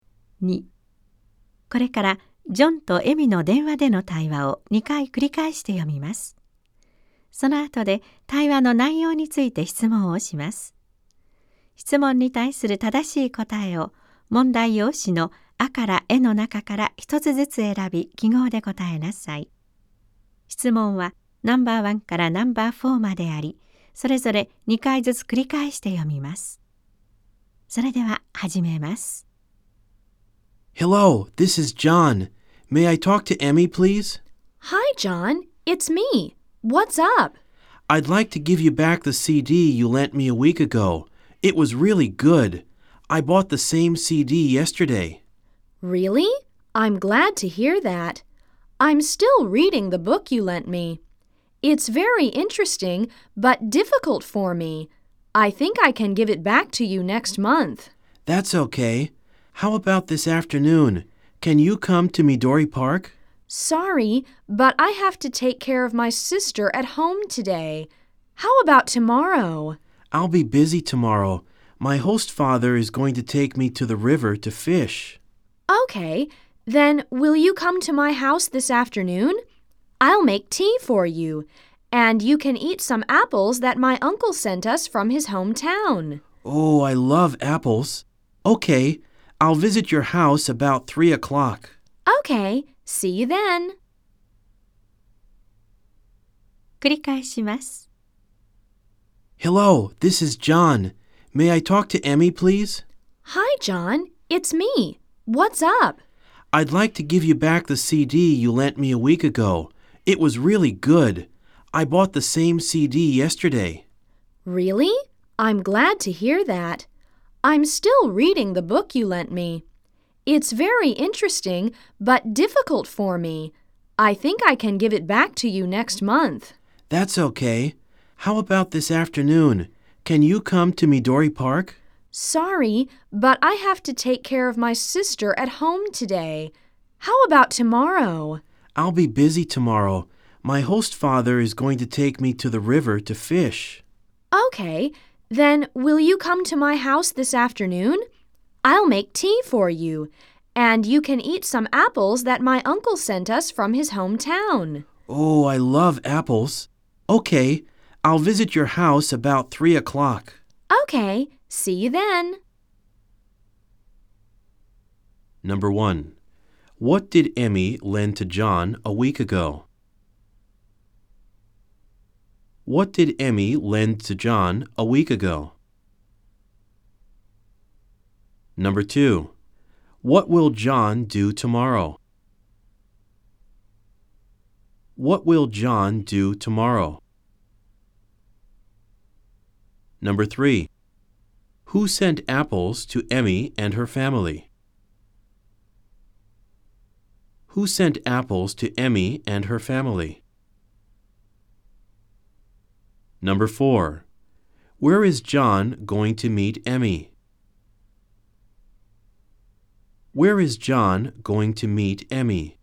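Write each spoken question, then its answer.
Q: what did Emmy lend to John a week ago?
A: A CD

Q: what will John do tomorrow?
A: He will go fishing in the river with his host father

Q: who sent apples to Emmy and her family?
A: Emmy's uncle

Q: where is John going to meet Emmy?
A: At Emmy's house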